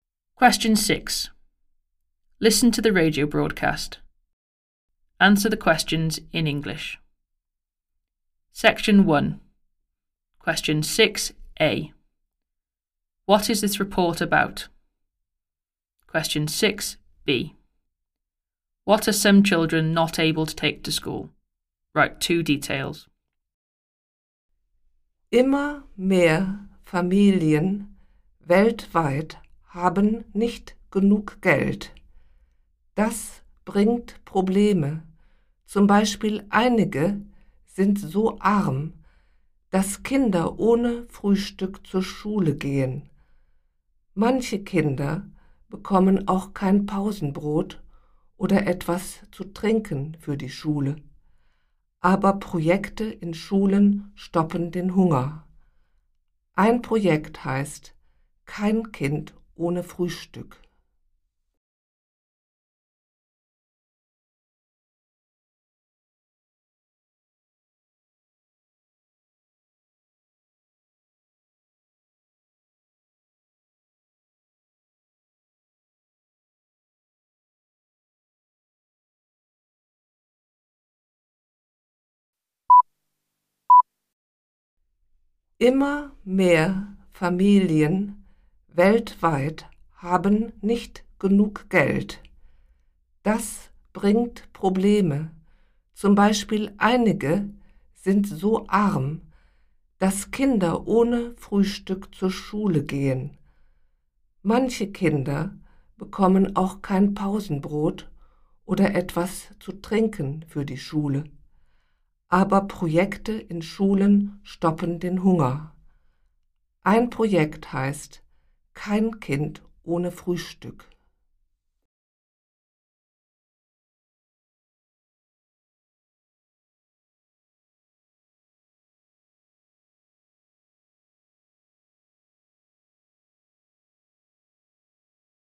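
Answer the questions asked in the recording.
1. Families without enough money / children going hungry
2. A packed snack (sandwich) and something to drink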